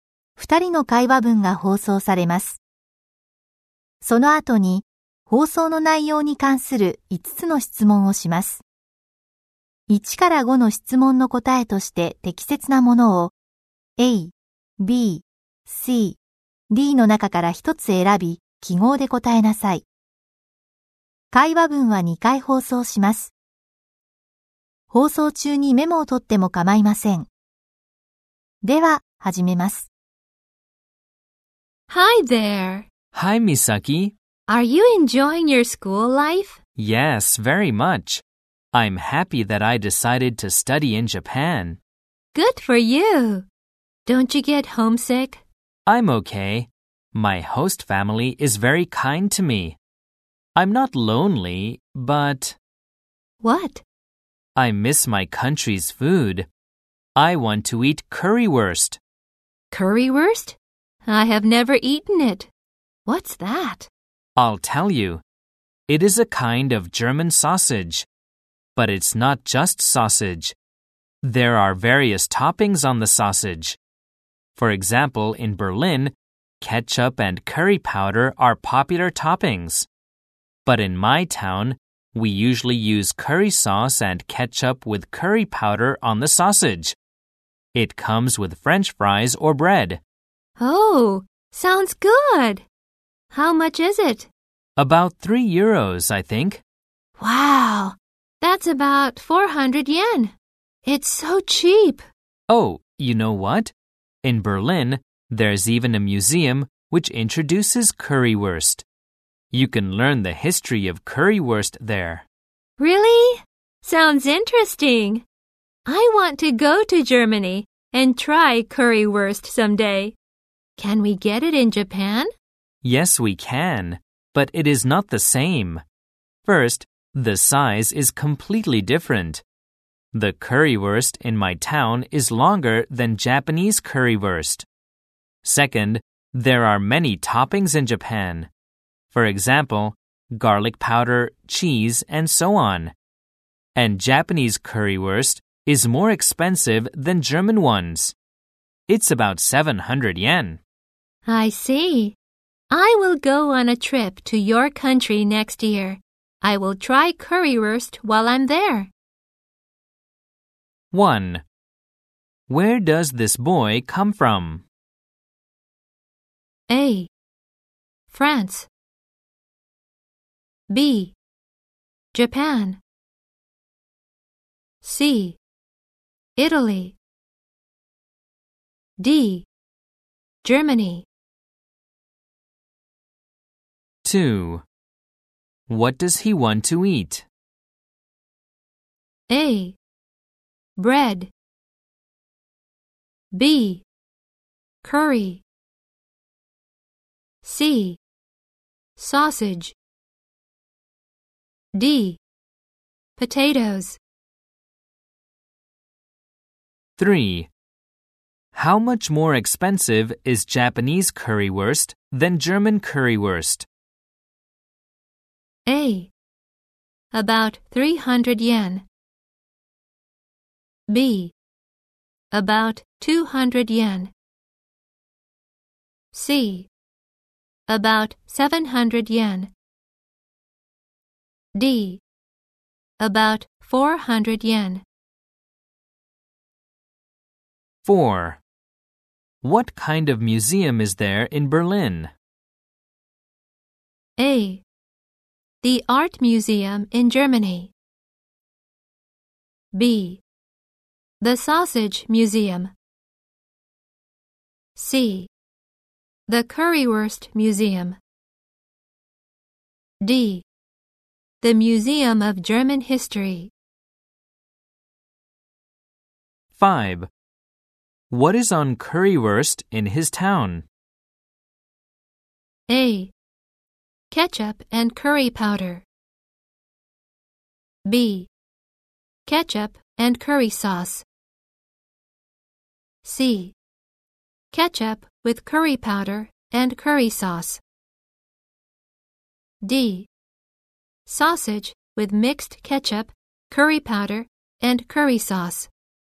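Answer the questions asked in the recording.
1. D: Germany.
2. C: Sausage.
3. A: About 300 yen.
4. C: The Currywurst Museum.
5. C: Ketchup with curry powder and curry sauce.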